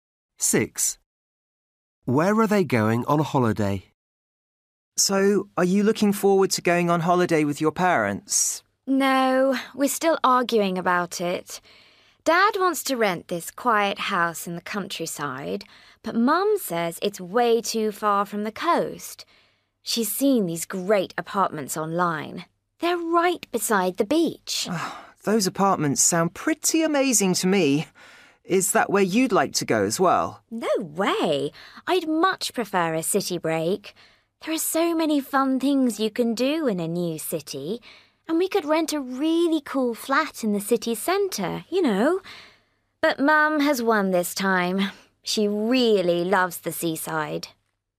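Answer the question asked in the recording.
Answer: To apartments beside the beach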